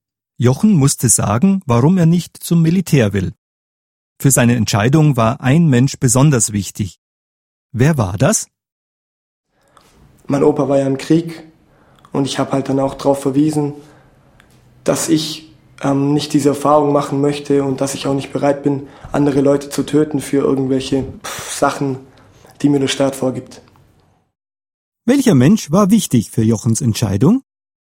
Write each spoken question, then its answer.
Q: Welcher Mensch war wichtig für Jochens Entscheidung?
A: Sein Opa, also sein Großvater.